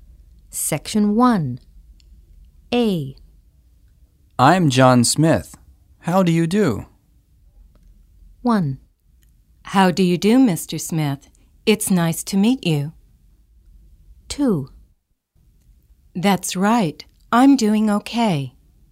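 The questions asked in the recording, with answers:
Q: I'm John Smith. How do you do?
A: 1: How do you do, Mr. Smith? It's nice to meet you.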